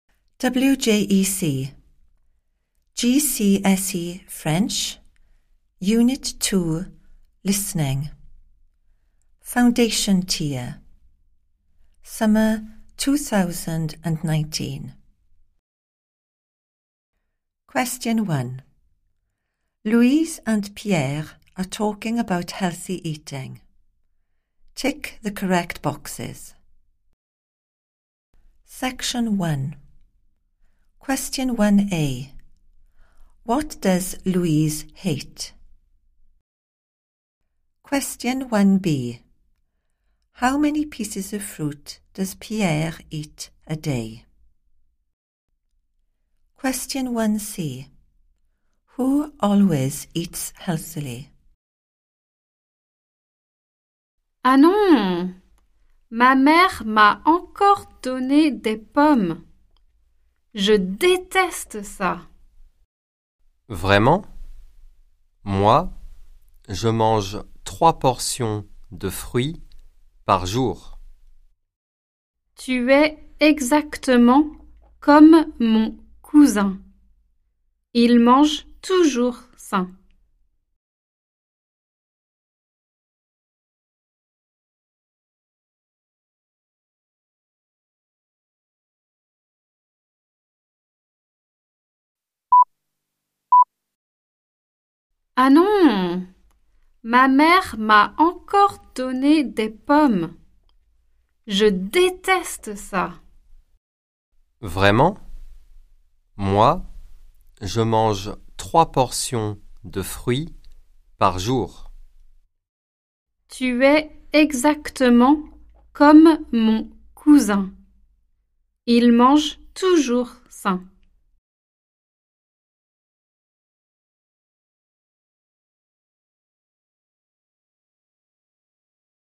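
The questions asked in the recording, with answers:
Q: What does Louise hate?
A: apples

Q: Who always eats healthily?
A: Louise's cousin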